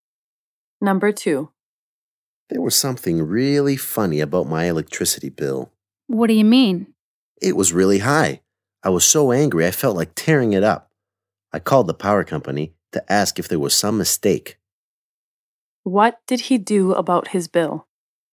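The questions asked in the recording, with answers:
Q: What did he do about his bill?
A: He called the power company to ask if there was a mistake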